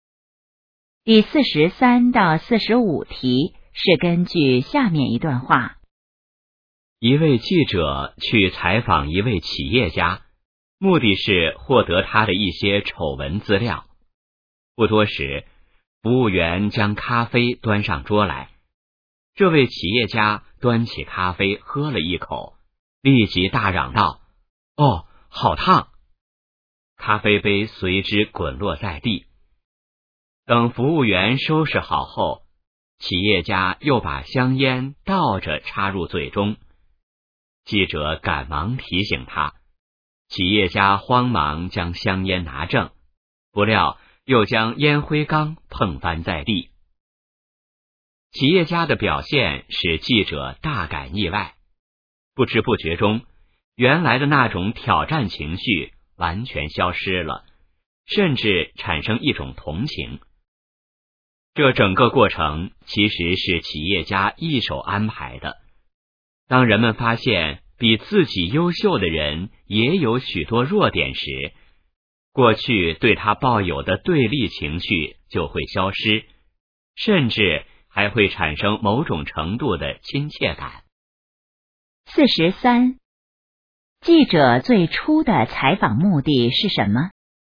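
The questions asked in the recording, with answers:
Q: 记者最初的采访目的是什么?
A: 获得企业家的一些丑闻资料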